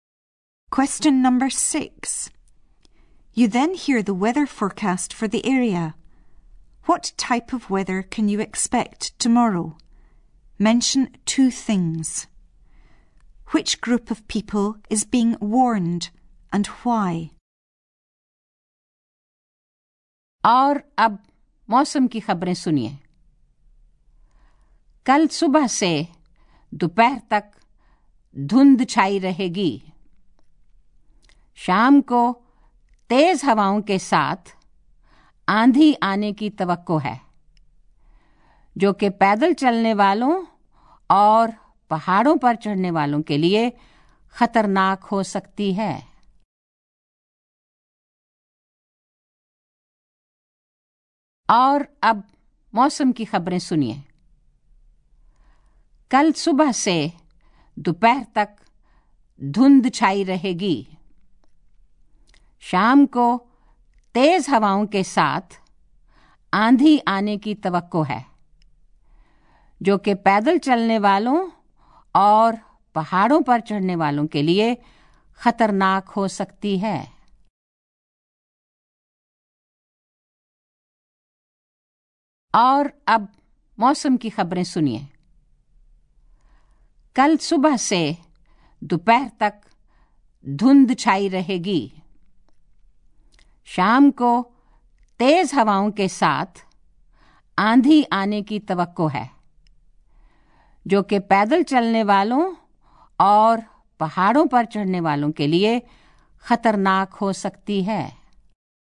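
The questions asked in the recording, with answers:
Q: What type of weather can you expect tomorrow?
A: Fog from morning to afternoon; strong winds/storm in the evening

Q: Which group of people is being warned and why?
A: Walkers and mountain climbers, because the storm could be dangerous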